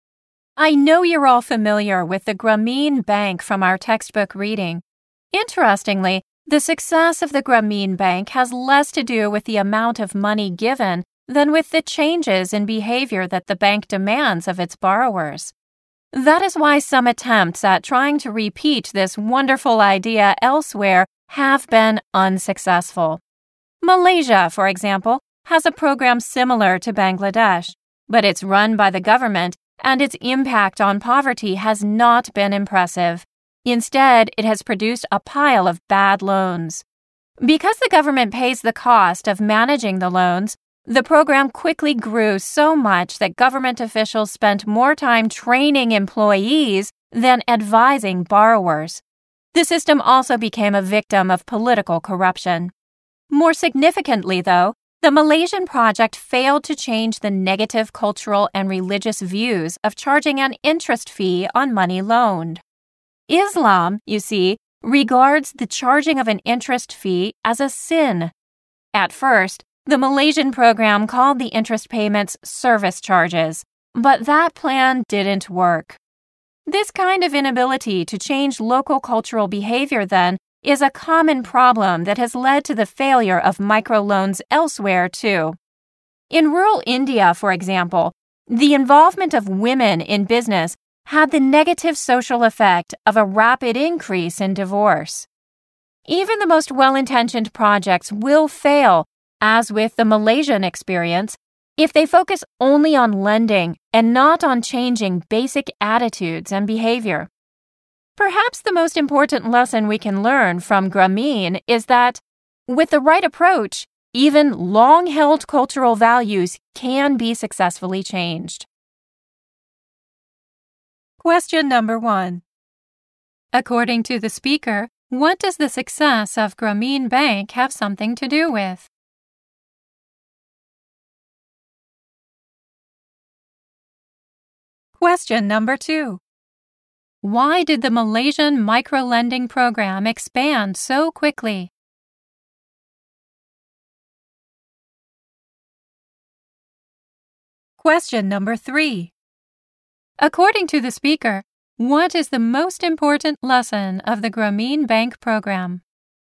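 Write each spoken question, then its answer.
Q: According to the speaker, what does the success of Grameen Bank have something to do with?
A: The changes in behavior that the bank demands of its borrowers

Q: Why did the Malaysian microlending program expand so quickly?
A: Because the government pays the cost of managing the loans

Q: According to the speaker, what is the most important lesson of the Grameen Bank program?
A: With the right approach, even long-held cultural values can be successfully changed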